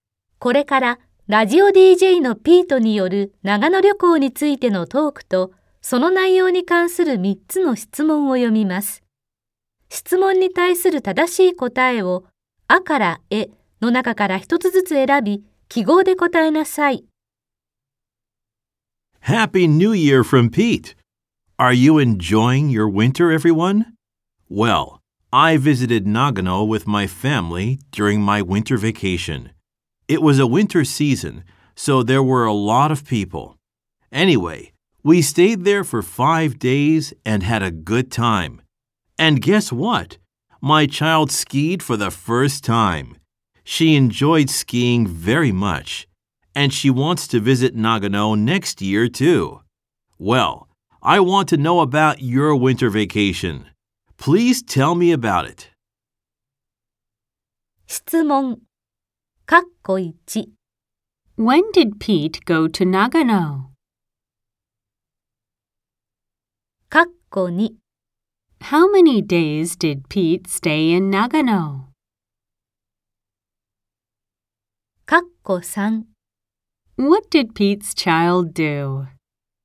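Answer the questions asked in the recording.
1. During his winter vacation
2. 5 days
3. She skied for the first time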